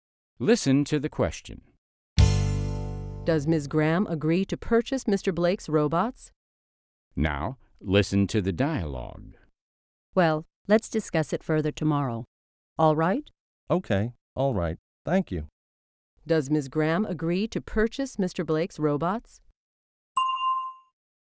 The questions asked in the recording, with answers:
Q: Does Ms. Graham agree to purchase Mr. Blake's robots?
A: No, she doesn't. She says they will discuss it again tomorrow.